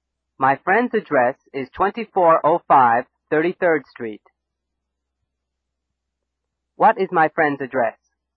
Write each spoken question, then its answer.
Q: What is my friend's address?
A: My friend's address is 2405 33rd Street.